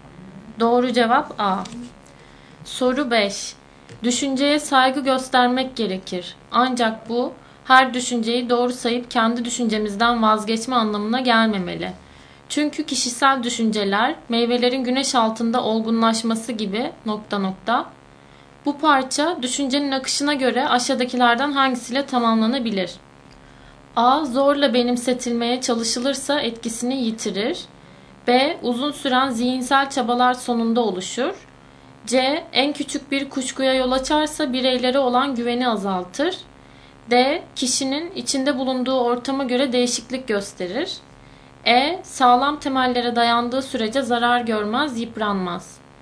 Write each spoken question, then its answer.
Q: Bu parça düşüncenin akışına göre aşağıdakilerden hangisiyle tamamlanabilir?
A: Doğru cevap B.